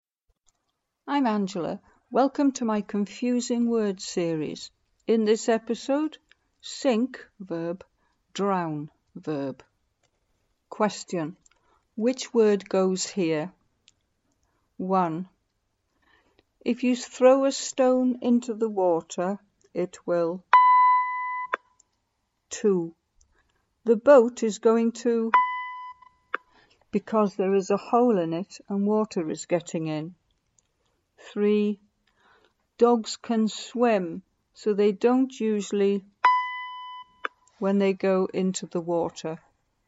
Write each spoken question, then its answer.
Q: If you throw a stone into the water, it will.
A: If you throw a stone into the water, it will sink.

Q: The boat is going to, because there is a hole in it and water is getting in.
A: The boat is going to sink because there is a hole in it and water is getting in.

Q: Dogs can swim, so they don't usually when they go into the water.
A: Dogs can swim, so they don't usually drown when they go into the water.